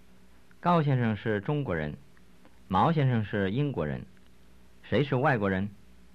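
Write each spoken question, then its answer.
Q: 谁是外国人?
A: 毛先生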